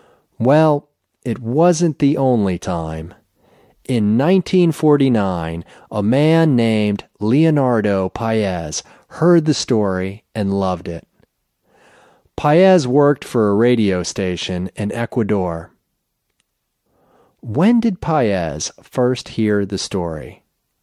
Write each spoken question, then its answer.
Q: When did Paez first hear the story?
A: He heard the story in 1949.